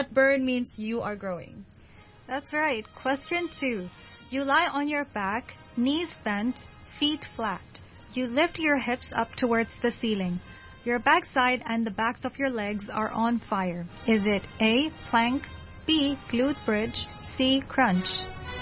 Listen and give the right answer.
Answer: Glute bridge.